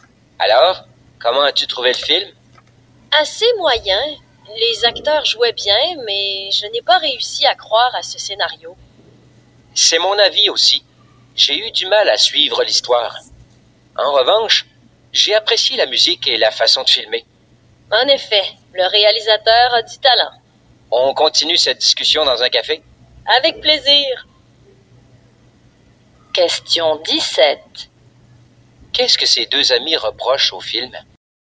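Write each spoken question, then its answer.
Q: Qu'est-ce que ces deux amis reprochent au film?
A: Le scénario, l'histoire difficile à croire et à suivre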